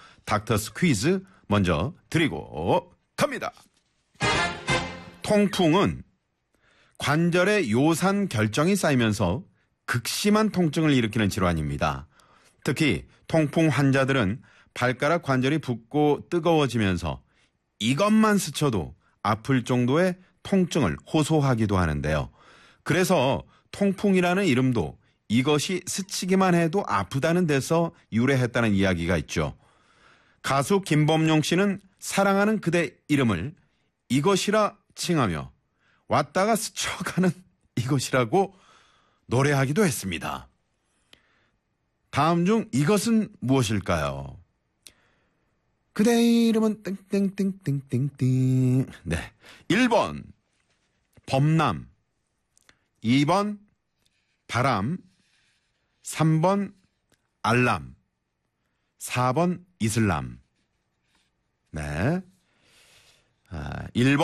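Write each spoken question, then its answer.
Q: 다음 중 이것은 무엇일까요?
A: 2번: 바람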